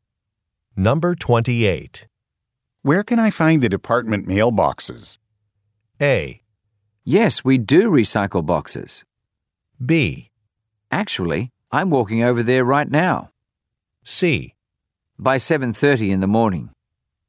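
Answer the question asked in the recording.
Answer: B: Actually, I'm walking over there right now.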